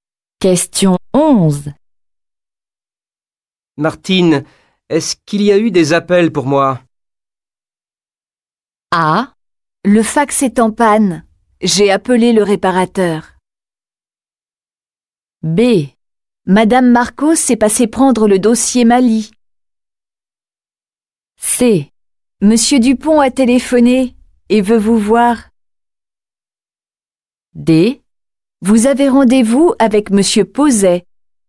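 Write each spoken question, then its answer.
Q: Martine, est-ce qu'il y a eu des appels pour moi?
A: C: Monsieur Dupont a téléphoné et veut vous voir.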